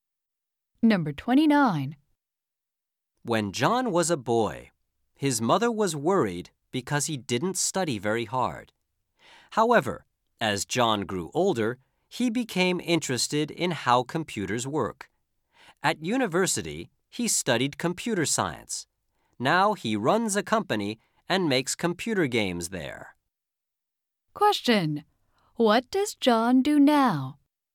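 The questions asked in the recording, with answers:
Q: What does John do now?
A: He runs a company that makes computer games.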